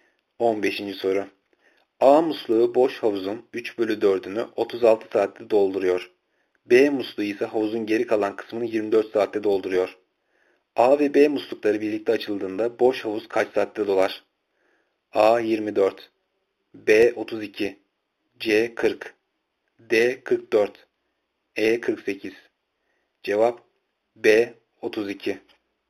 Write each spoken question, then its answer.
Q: A ve B muslukları birlikte açıldığında boş havuz kaç saatte dolar?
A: Cevap B 32.